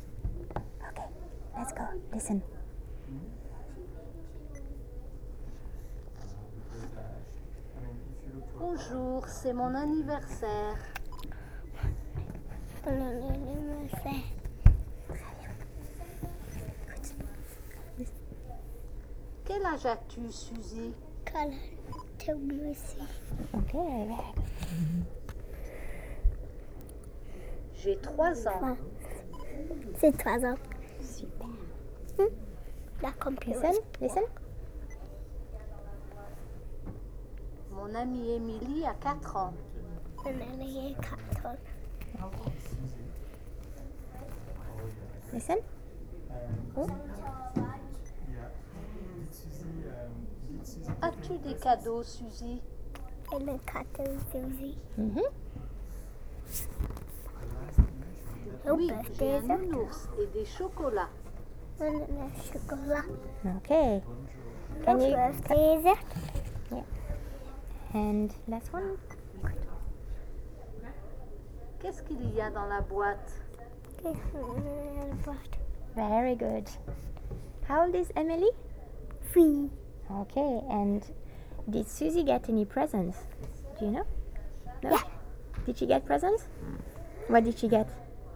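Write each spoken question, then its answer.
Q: Did she get presents? What did she get?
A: Yes, a teddy bear and chocolates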